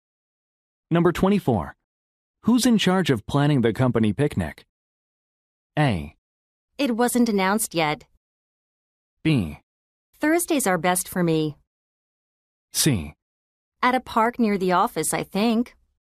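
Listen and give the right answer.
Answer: A: It wasn't announced yet.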